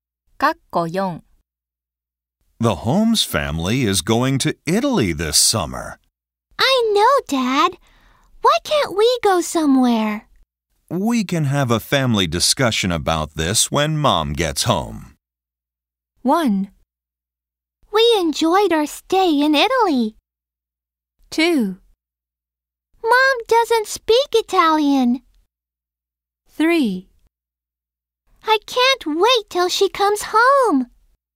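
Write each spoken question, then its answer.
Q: We can have a family discussion about this when Mom gets home.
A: 3: I can't wait till she comes home.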